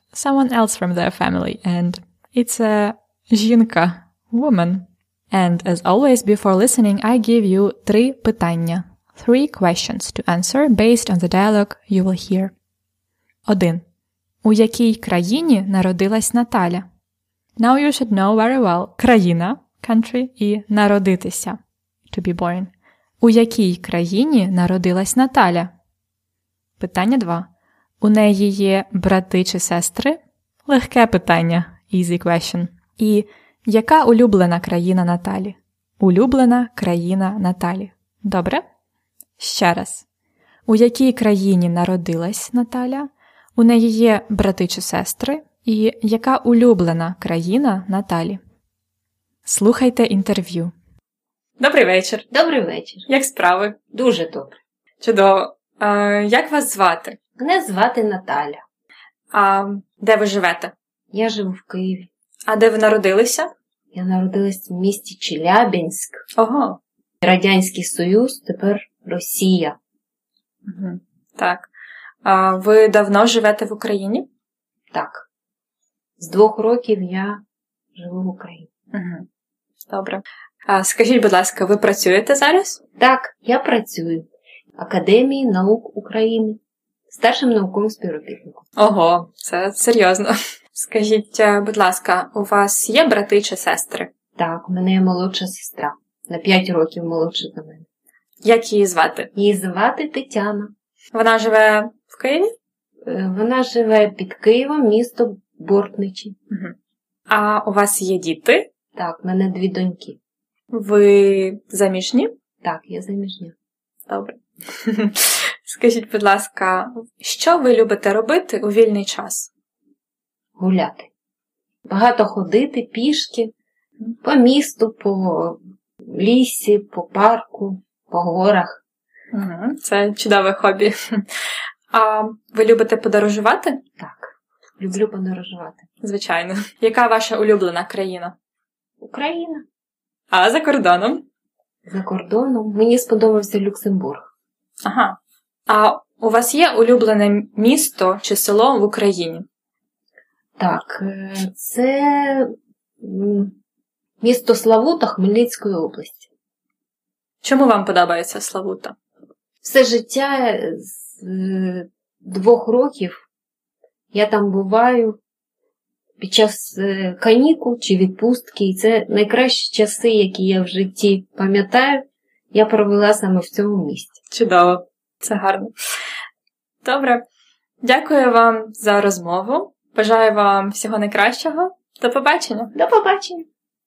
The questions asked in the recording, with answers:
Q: У якій країні народилась Наталя?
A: So, вона народилась у місті Челябінськ Радянський Союз, тепер нау Росія.

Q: У неї є брати чи сестри?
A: Так, у неї є одна сестра.

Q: І яка улюблена країна Наталі?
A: Україна це її улюблена країна.